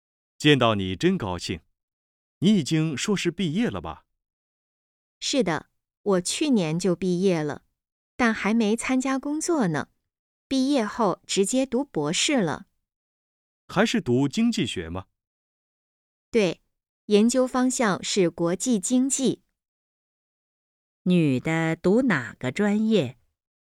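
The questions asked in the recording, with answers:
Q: 女的读哪个专业?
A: 经济学(国际经济)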